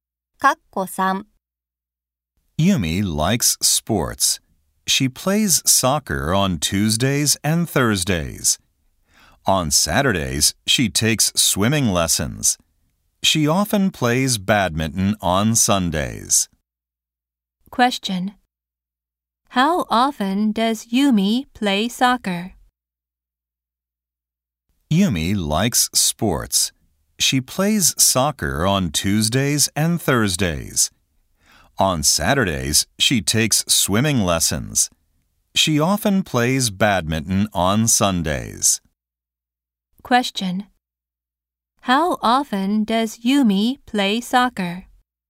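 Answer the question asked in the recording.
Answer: Twice a week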